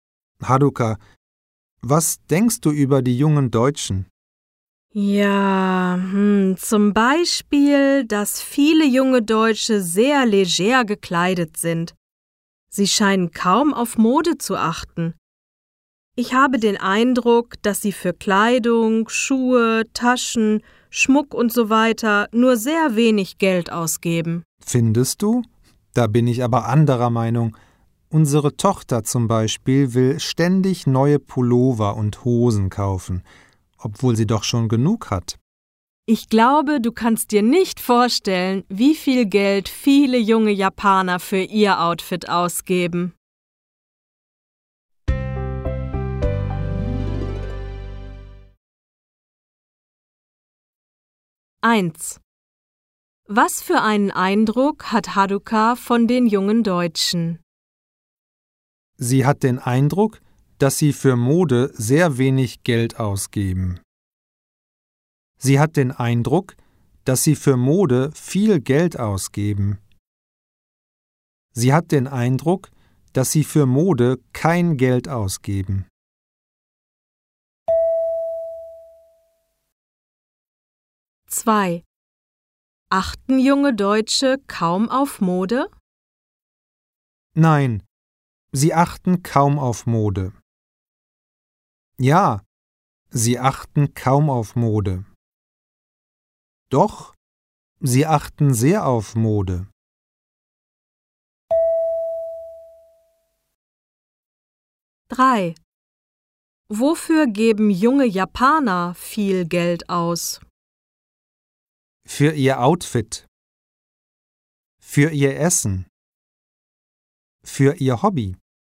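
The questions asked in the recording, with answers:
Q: Was für einen Eindruck hat Haruka von den jungen Deutschen?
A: A: Sie hat den Eindruck, dass sie für Mode sehr wenig Geld ausgeben.

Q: Wofür geben junge Japaner viel Geld aus?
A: A: Für ihr Outfit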